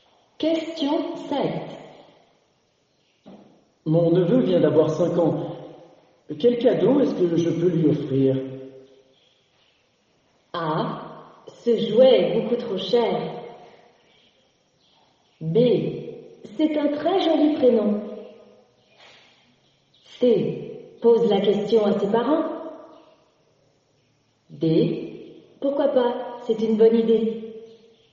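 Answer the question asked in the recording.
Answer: C: Pose la question à ses parents.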